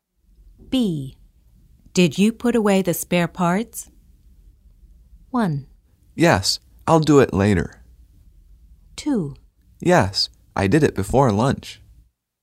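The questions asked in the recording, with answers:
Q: Did you put away the spare parts?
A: 2: Yes, I did it before lunch.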